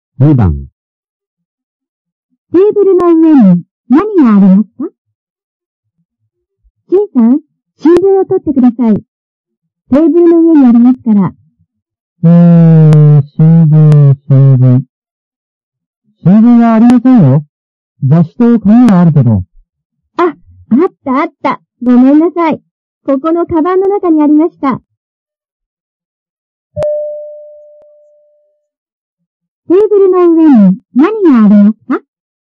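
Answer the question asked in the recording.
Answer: 雑誌と紙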